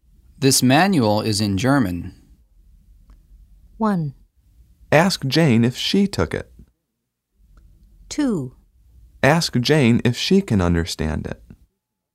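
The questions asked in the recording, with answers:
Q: This manual is in German.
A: 2: Ask Jane if she can understand it.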